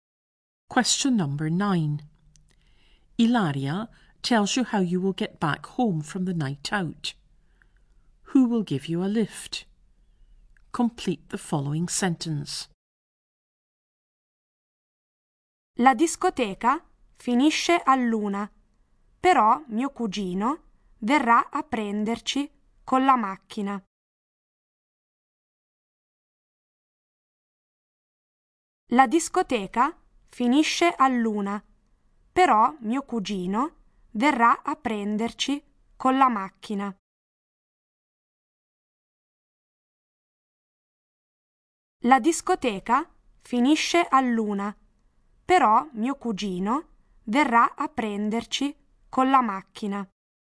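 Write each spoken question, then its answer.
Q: Who will give you a lift?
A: Her cousin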